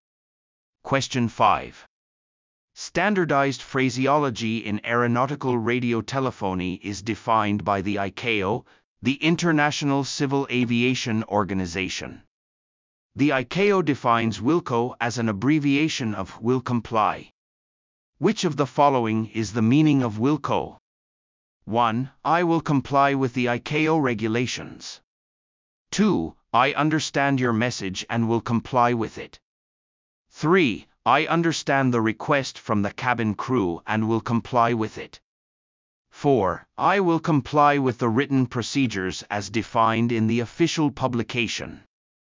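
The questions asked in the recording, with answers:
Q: Which of the following is the meaning of WILCO?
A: 2: I understand your message and will comply with it.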